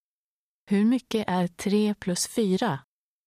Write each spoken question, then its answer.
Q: Hur mycket är 3 plus 4?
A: 7. 7.